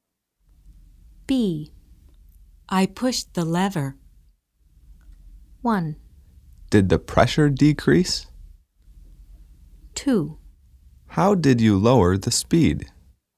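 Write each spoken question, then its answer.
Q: I pushed the lever.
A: 2: How did you lower the speed?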